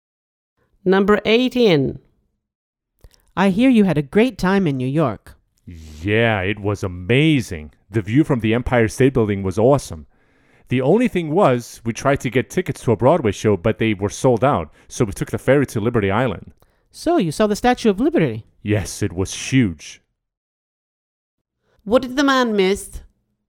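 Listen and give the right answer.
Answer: A Broadway show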